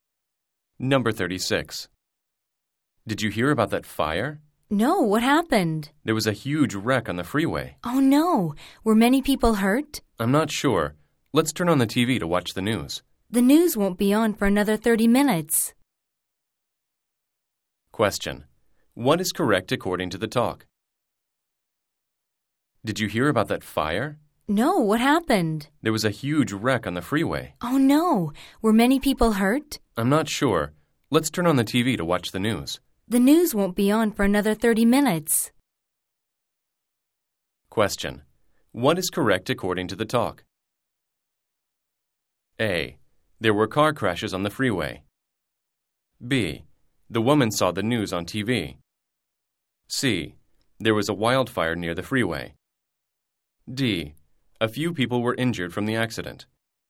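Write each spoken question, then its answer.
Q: What is correct according to the talk?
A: A: There were car crashes on the freeway.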